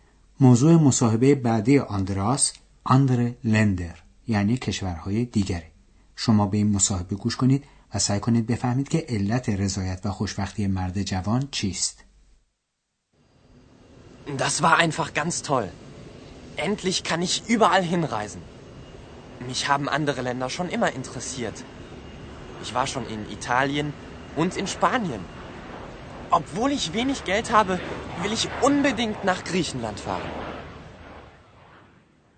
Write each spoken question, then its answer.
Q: سعی کنید بفهمید که علت رضایت و خوشبختی مرد جوان چیست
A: پس این جوان از اون جهت راضی است که به قول خودش بالاخره میتونه به هر جا که میخواد سفر کنه.